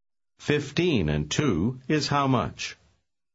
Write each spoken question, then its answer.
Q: 15 and 2 is how much?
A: 17.